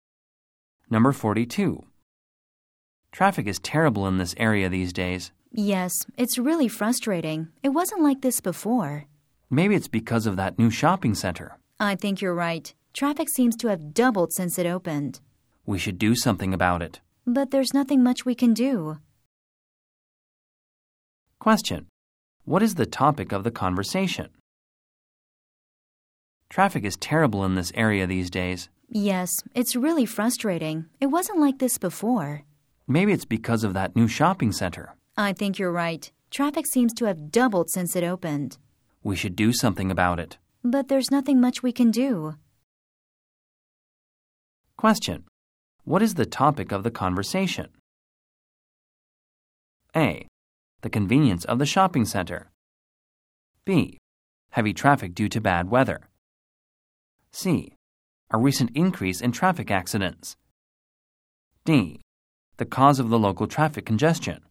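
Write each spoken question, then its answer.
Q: What is the topic of the conversation?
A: D: The cause of the local traffic congestion.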